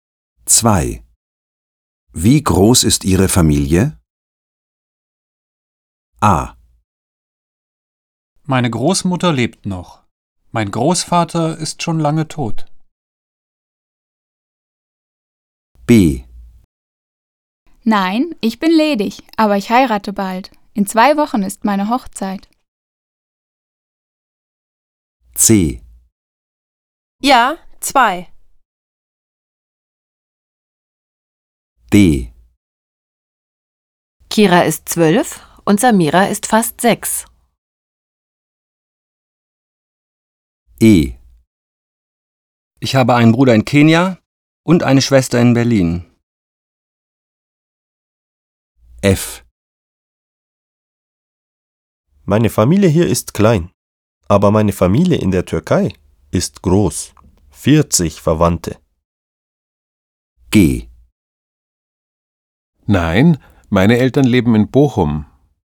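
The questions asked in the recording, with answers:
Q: Wie groß ist Ihre Familie?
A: F: Meine Familie hier ist klein, aber meine Familie in der Türkei ist groß. 40 Verwandte.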